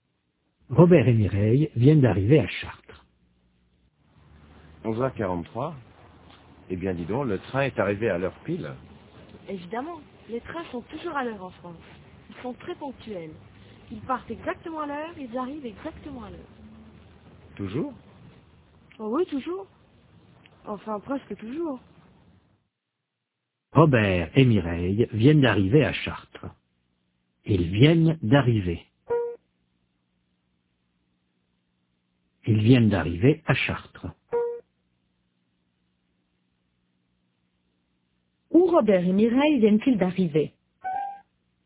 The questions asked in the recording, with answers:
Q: Où Robert et Mireille viennent-ils d'arriver ?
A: À Chartres.